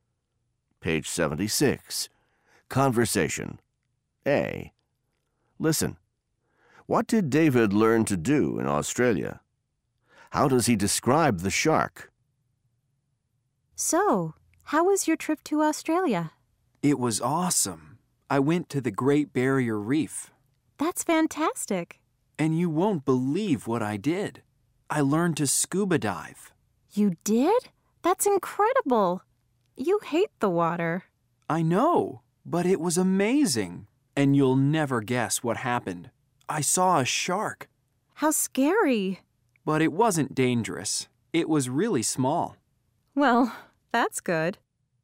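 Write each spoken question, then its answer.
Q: What did David learn to do in Australia?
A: He learned to scuba dive.

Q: How does he describe the shark?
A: It wasn't dangerous; it was really small.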